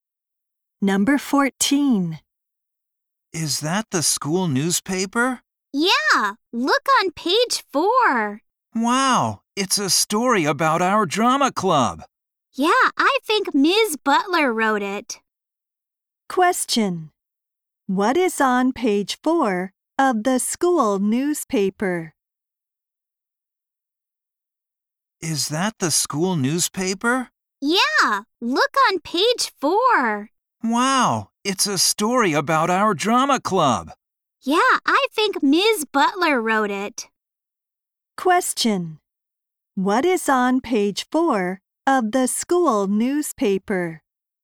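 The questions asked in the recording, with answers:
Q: What is on page 4 of the school newspaper?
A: A story about the drama club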